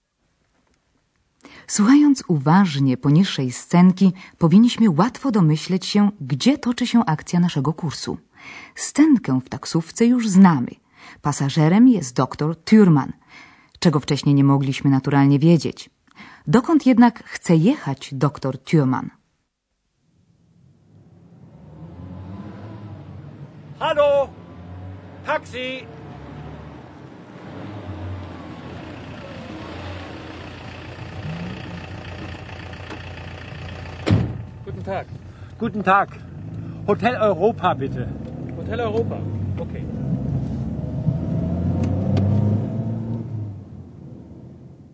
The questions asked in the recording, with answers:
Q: Dokąd jednak chce jechać dr Thürmann?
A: Dr Thürmann prosi kierowcę taksówki o zawiezienie go do hotelu Europa.